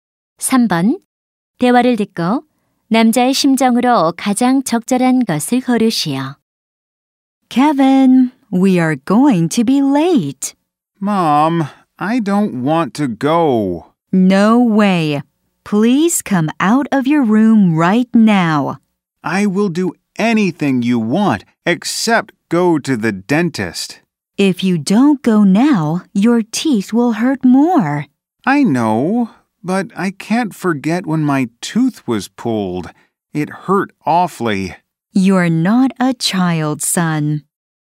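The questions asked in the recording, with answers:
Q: 대화를 듣고 남자의 심정으로 가장 적절한 것을 고르시오.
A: 두려움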